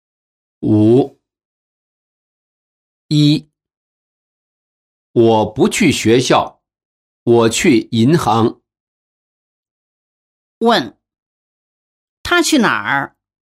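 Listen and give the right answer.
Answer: 银行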